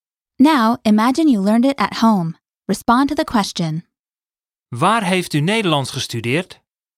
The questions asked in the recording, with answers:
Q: Waar heeft u Nederlands gestudeerd?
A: Ik heb het thuis geleerd.